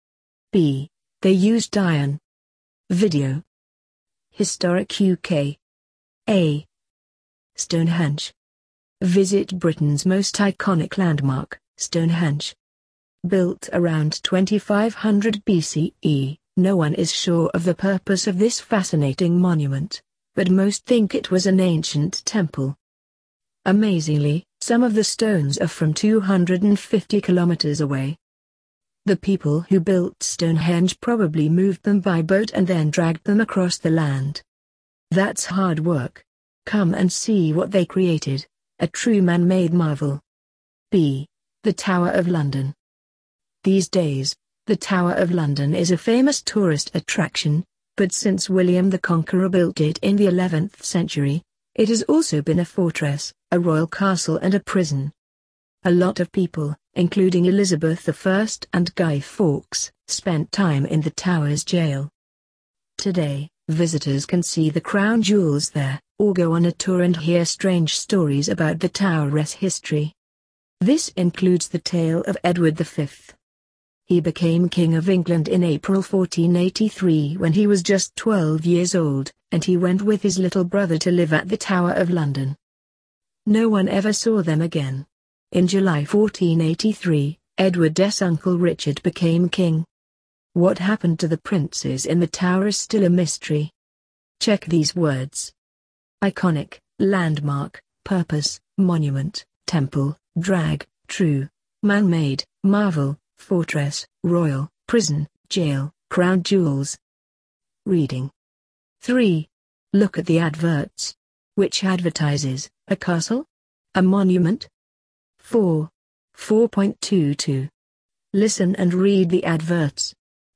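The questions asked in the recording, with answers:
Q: Which advertises, a castle?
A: B: The Tower of London

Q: A monument?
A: A: Stonehenge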